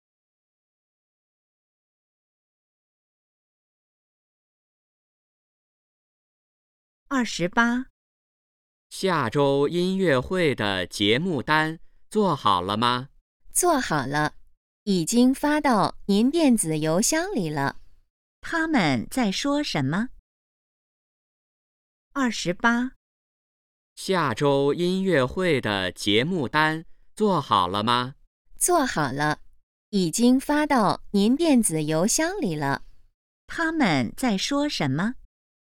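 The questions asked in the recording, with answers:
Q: 他们在说什么?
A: 音乐会的节目单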